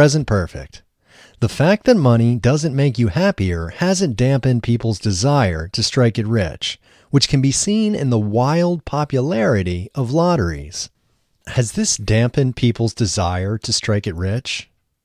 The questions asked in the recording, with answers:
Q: Has this dampened people's desire to strike it rich?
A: No, this hasn't dampened people's desire to strike it rich.